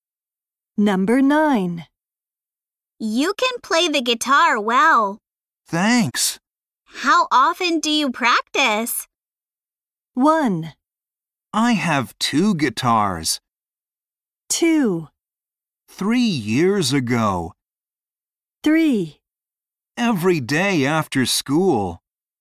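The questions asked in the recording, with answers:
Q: How often do you practice?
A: 3: Every day after school.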